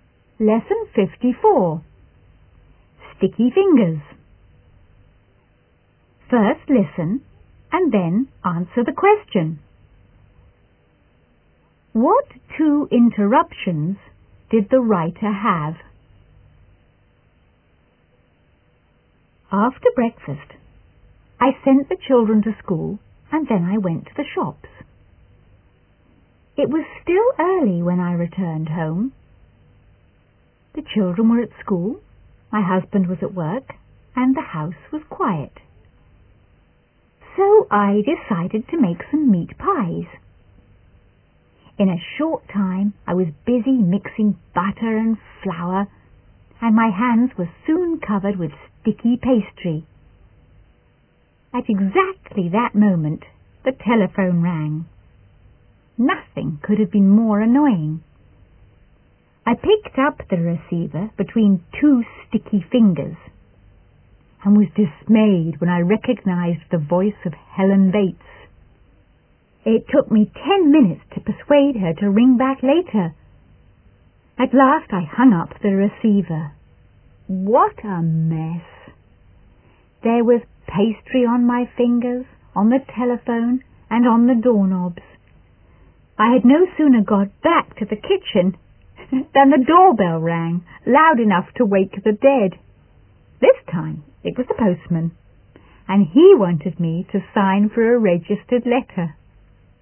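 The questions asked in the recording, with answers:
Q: What two interruptions did the writer have?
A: A telephone call from Helen Bates and the postman ringing the doorbell with a registered letter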